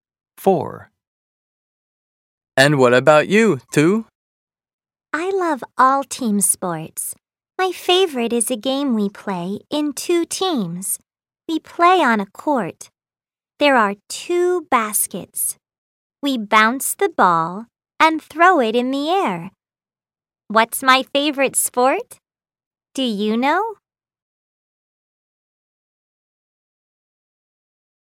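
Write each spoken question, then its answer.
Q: What's my favorite sport? Do you know?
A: basketball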